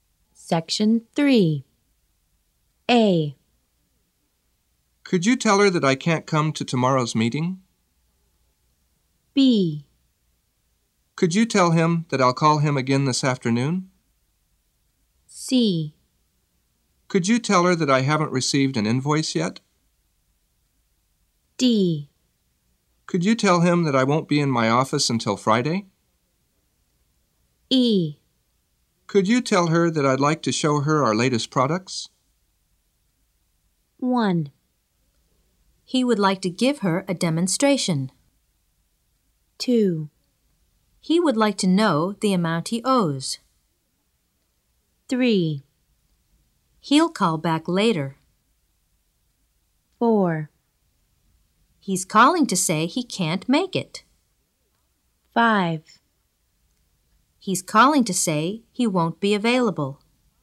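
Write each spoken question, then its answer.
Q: He would like to give her a demonstration.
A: E: Could you tell her that I'd like to show her our latest products?

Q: He would like to know the amount he owes.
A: C: Could you tell her that I haven't received an invoice yet?

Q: He'll call back later.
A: B: Could you tell him that I'll call him again this afternoon?

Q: He's calling to say he can't make it.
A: A: Could you tell her that I can't come to tomorrow's meeting?

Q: He's calling to say he won't be available.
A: D: Could you tell him that I won't be in my office until Friday?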